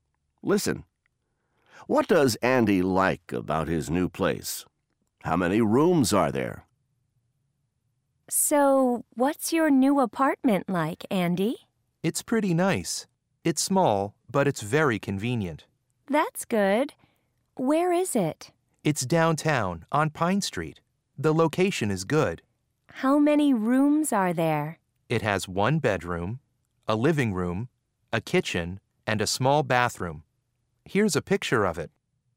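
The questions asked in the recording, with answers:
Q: What does Andy like about his new place?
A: It's very convenient; the location is good (downtown, on Pine Street).

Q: How many rooms are there?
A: Four: one bedroom, a living room, a kitchen, and a small bathroom.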